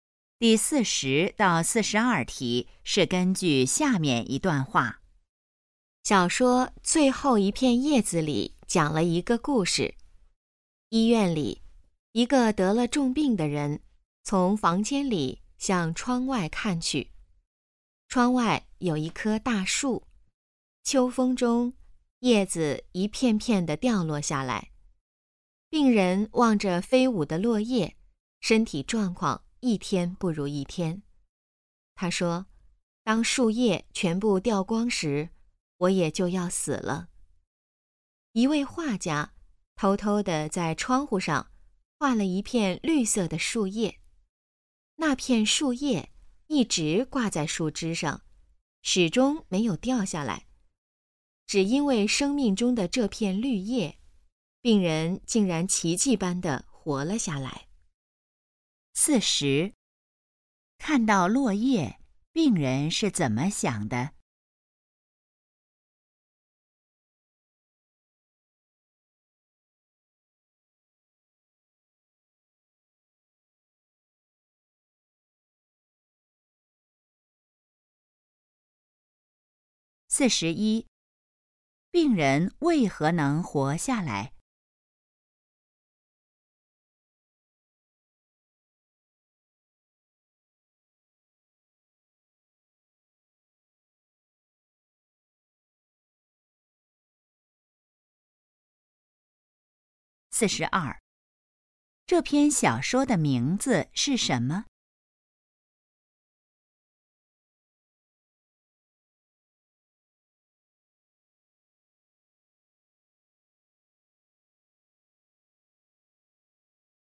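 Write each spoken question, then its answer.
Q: 看到落叶,病人是怎么想的?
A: 树叶掉光时自己就要死了

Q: 病人为何能活下来?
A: 画家画的那片绿叶一直没有掉

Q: 这篇小说的名字是什么?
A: 最后一片叶子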